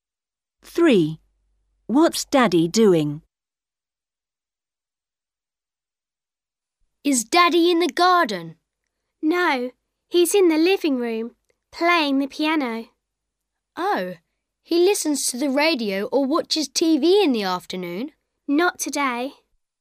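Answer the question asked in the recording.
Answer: Playing the piano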